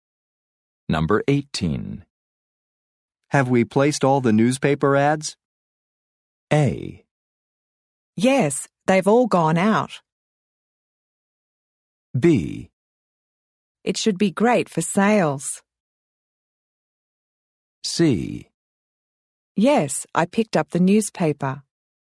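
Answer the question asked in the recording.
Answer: A: Yes, they've all gone out.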